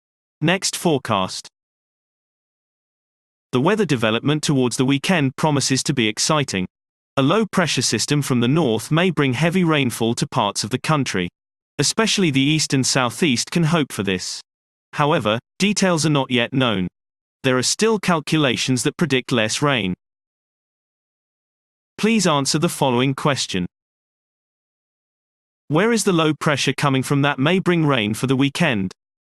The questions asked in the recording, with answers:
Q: Where is the low pressure coming from that may bring rain for the weekend?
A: The low is coming from the north.